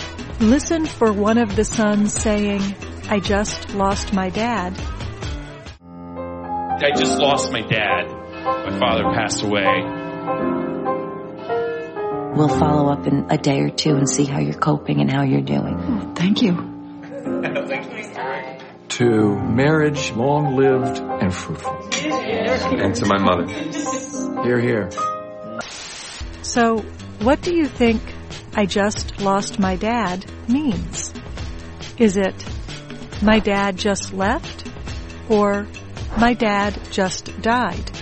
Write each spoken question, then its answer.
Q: So, what do you think I just lost my dad means?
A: I just lost my dad means my dad just died.